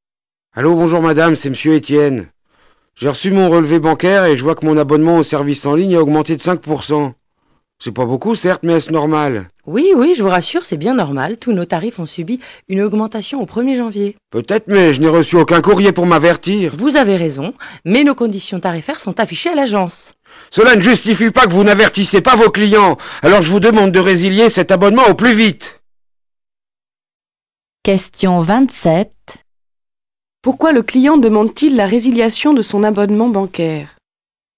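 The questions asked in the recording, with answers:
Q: Pourquoi le client demande-t-il la résiliation de son abonnement bancaire ?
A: Il n'a pas été averti de l'augmentation du tarif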